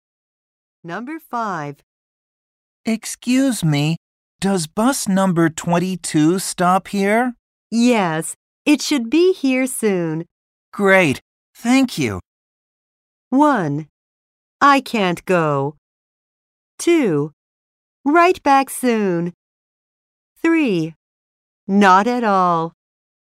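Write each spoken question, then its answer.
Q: Great, thank you.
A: 3: Not at all.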